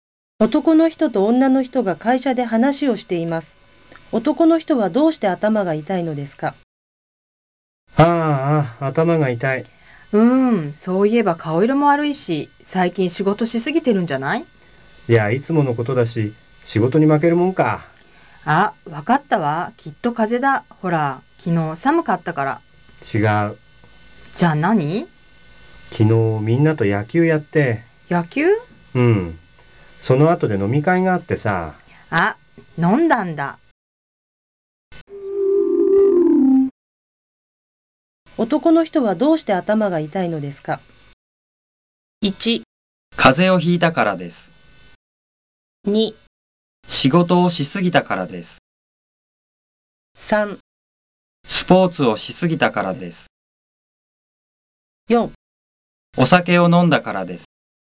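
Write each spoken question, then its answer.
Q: 男の人はどうして頭が痛いのですか?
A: 4: お酒を飲んだからです。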